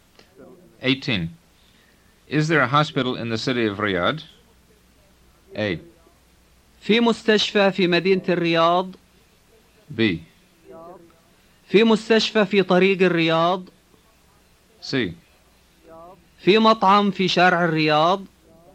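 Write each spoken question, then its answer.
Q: Is there a hospital in the city of Riyadh?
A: A: في مستشفى في مدينة الرياض.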